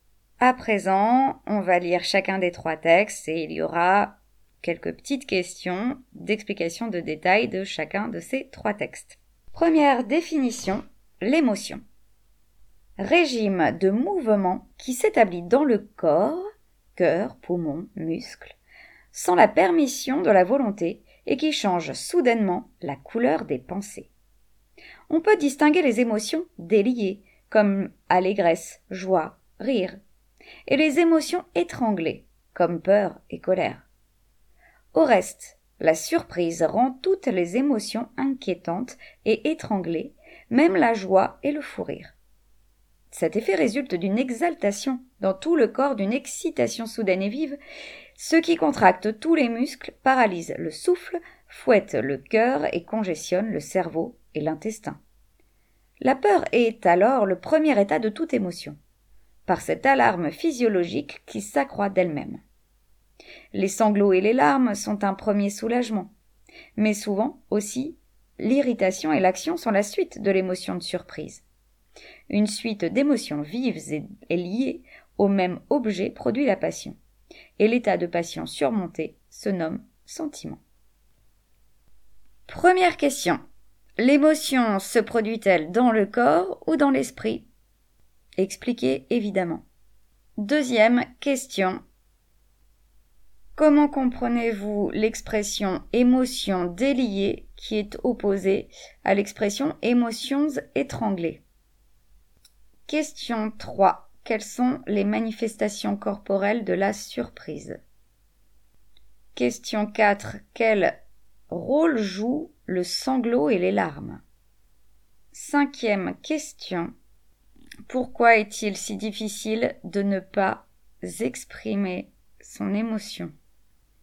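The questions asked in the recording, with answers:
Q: Première question, l'émotion se produit-elle dans le corps ou dans l'esprit ?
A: Dans le corps (cœur, poumons, muscles), sans la permission de la volonté

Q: Quelles sont les manifestations corporelles de la surprise ?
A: Elle contracte tous les muscles, paralyse le souffle, fouette le cœur et congestionne le cerveau et l'intestin

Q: Quel rôle joue le sanglot et les larmes ?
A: Ils sont un premier soulagement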